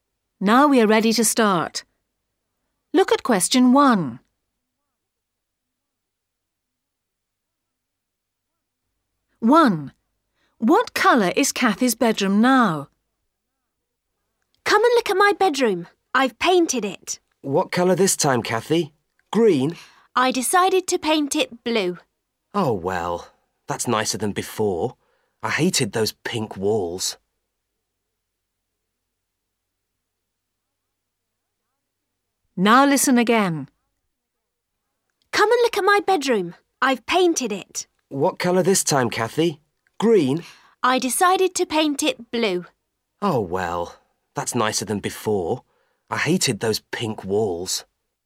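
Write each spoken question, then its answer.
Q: What colour is Kathy's bedroom now?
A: Blue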